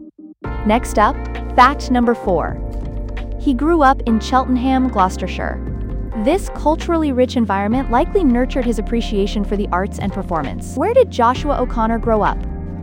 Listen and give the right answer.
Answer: Cheltenham, Gloucestershire.